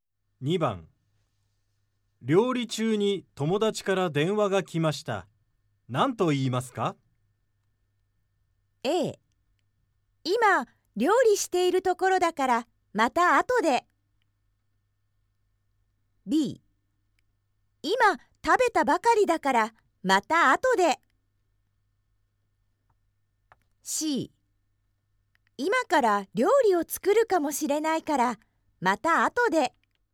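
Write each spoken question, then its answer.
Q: 料理中に友達から電話が来ました。何と言いますか?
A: A: 今、料理しているところだから、また後で。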